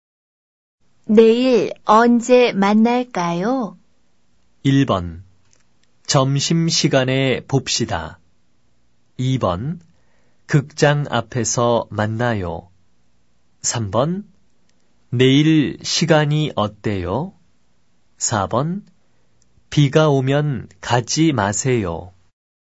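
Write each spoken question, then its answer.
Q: 내일 언제 만날까요?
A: 1: 점심시간에 봅시다.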